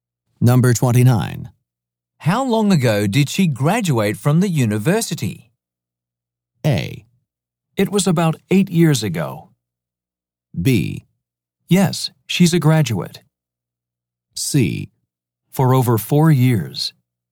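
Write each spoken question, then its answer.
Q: How long ago did she graduate from the university?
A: A: It was about 8 years ago.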